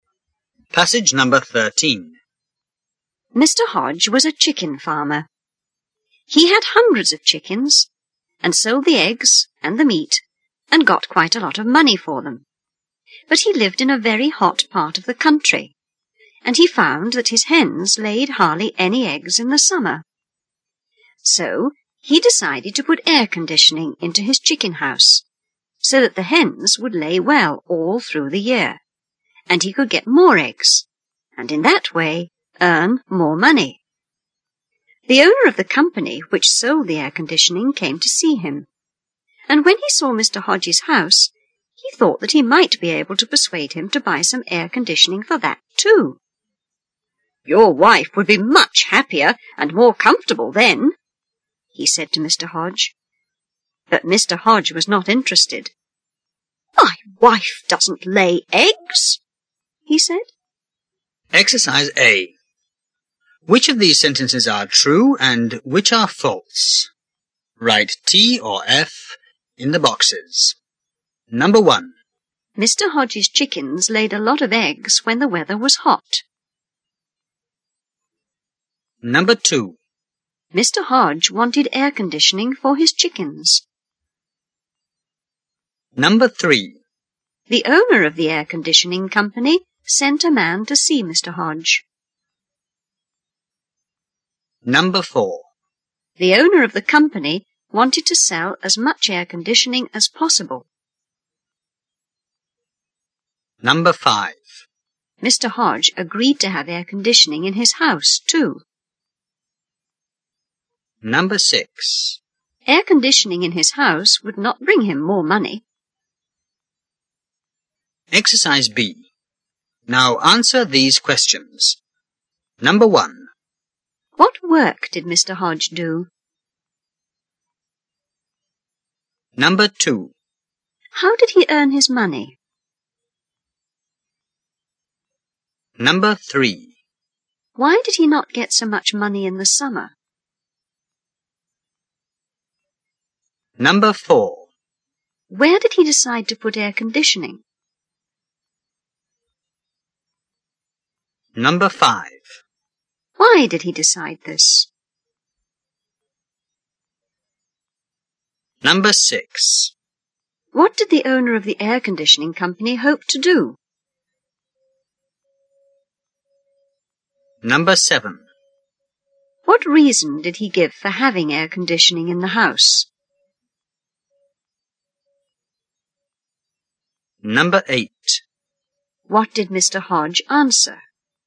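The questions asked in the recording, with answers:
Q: Mr. Hodge's chickens laid a lot of eggs when the weather was hot.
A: False

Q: Mr. Hodge wanted air conditioning for his chickens.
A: True

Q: The owner of the air conditioning company sent a man to see Mr.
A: False

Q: The owner of the company wanted to sell as much air conditioning as possible.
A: True

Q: Mr. Hodge agreed to have air conditioning in his house, too.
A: False

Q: Air conditioning in his house would not bring him more money.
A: True

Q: What work did Mr. Hodge do?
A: He was a chicken farmer.

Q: How did he earn his money?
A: By selling eggs and chicken meat.

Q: Why did he not get so much money in the summer?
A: His hens laid hardly any eggs in the hot summer.

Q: Where did he decide to put air conditioning?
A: In his chicken house.

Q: Why did he decide this?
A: So the hens would lay well all year and he could earn more money.

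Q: What did the owner of the air conditioning company hope to do?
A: Persuade him to buy air conditioning for his house too.

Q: What reason did he give for having air conditioning in the house?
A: His wife would be happier and more comfortable.

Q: What did Mr. Hodge answer?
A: "My wife doesn't lay eggs."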